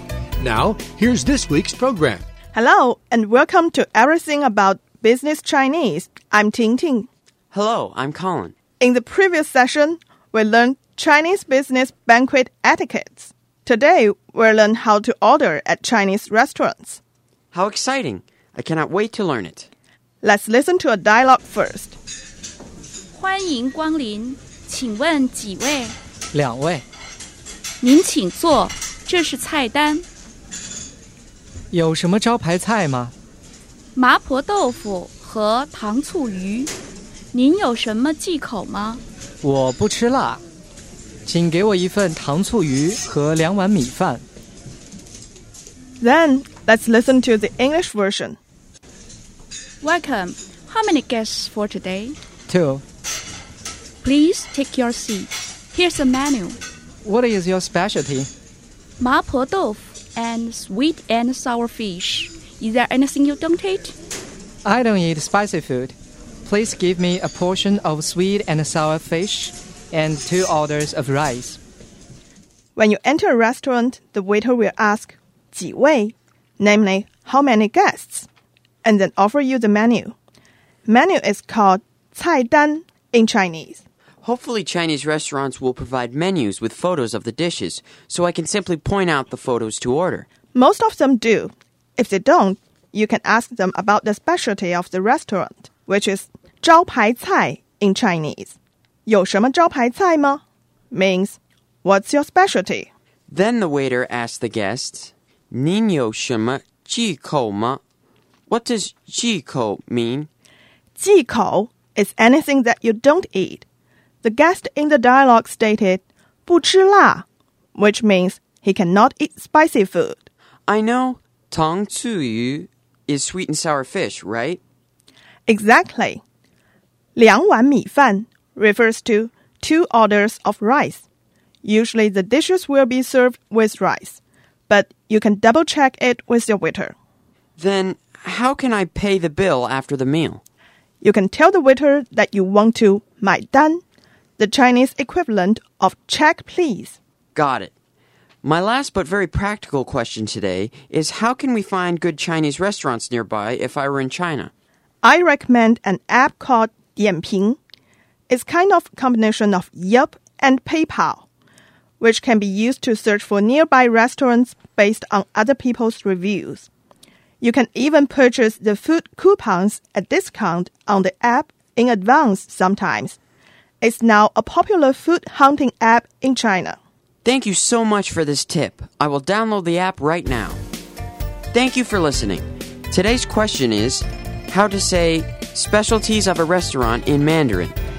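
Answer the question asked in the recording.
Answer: 招牌菜 (zhāopáicài)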